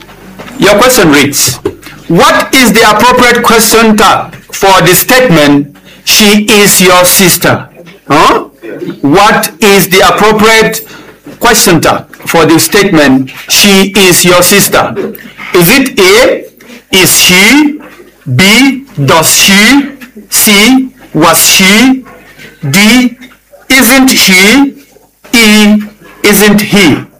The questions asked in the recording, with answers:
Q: what is the appropriate question tag for the statement, she is your sister?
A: D, isn't she?